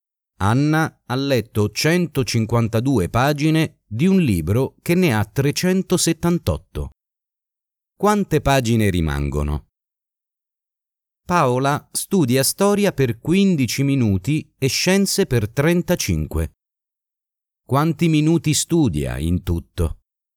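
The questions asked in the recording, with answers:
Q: Quante pagine rimangono?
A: 226

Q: Quanti minuti studia in tutto?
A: 50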